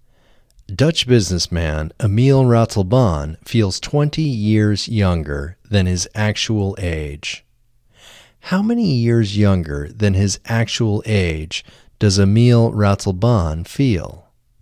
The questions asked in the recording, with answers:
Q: How many years younger than his actual age does Emile Ratelbaan feel?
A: Emile Ratelbaan feels 20 years younger than his actual age.